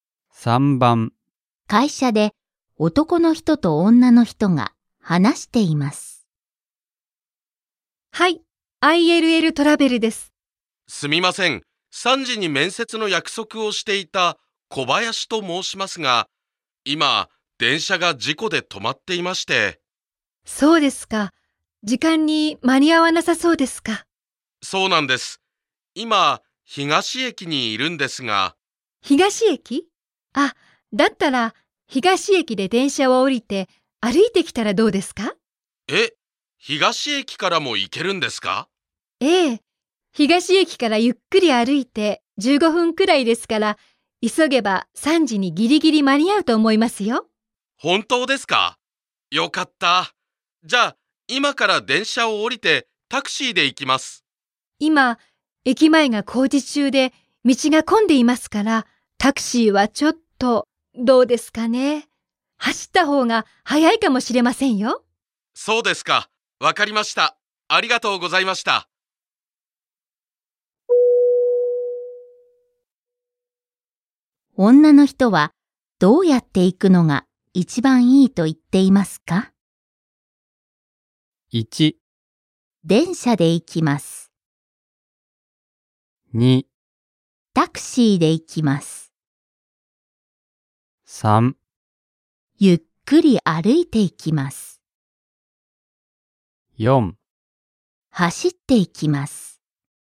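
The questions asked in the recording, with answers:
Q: 女の人はどうやって行くのが一番いいと言っていますか?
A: 4: 走って行きます。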